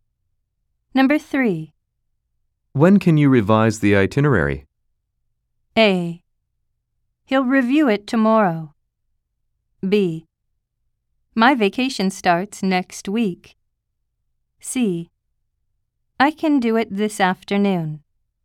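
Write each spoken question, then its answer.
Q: When can you revise the itinerary?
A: C: I can do it this afternoon.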